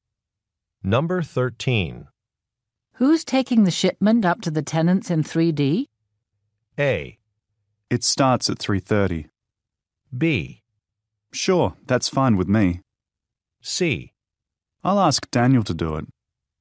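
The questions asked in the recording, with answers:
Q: Who's taking the shipment up to the tenants in 3D?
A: C: I'll ask Daniel to do it.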